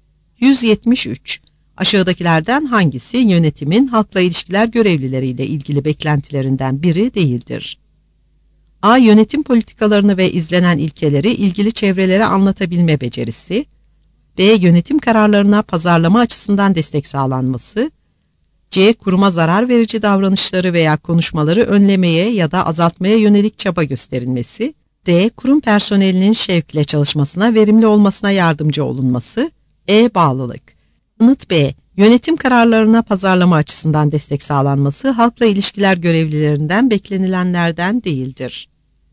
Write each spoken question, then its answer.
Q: Aşağıdakilerden hangisi yönetimin halkla ilişkiler görevlileriyle ilgili beklentilerinden biri değildir?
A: Yanıt B.